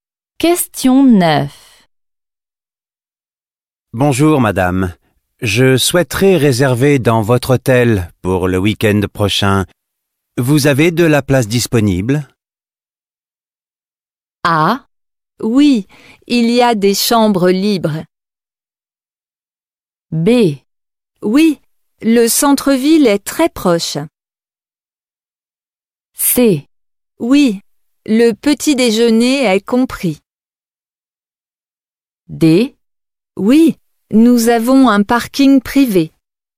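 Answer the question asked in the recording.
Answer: A: Oui, il y a des chambres libres.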